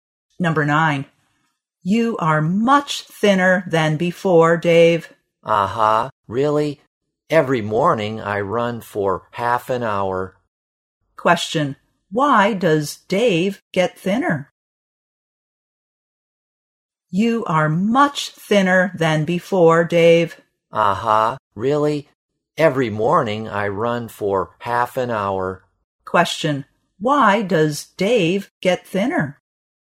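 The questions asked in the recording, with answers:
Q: Why does Dave get thinner?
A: He runs every morning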